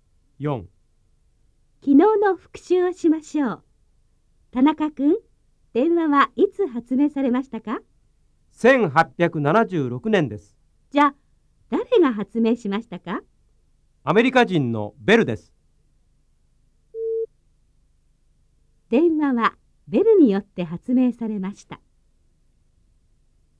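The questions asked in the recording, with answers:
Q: 電話はベルによって発明されました。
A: ○(正しい)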